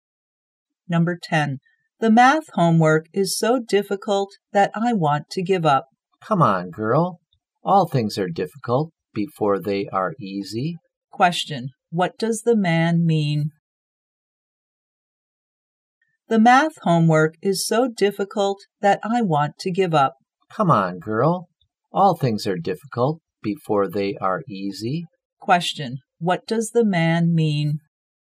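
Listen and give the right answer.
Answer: Don't give up; things get easier.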